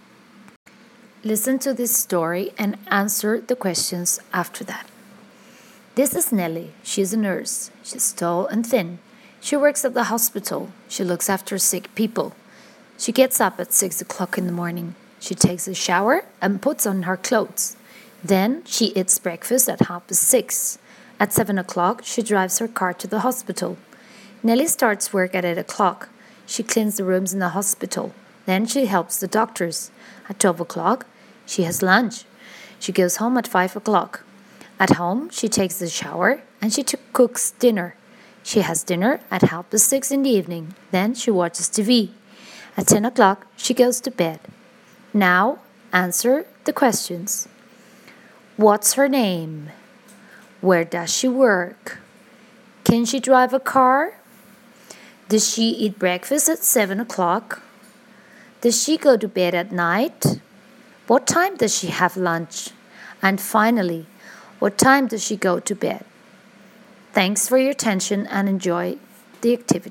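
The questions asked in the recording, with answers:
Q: What's her name?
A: Nelly

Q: Where does she work?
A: At the hospital

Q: Can she drive a car?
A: Yes, she can

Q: Does she eat breakfast at 7 o'clock?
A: No, she eats breakfast at 6:30

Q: Does she go to bed at night?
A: Yes, at 10 o'clock

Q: What time does she have lunch?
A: At 12 o'clock

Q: And finally, what time does she go to bed?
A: At 10 o'clock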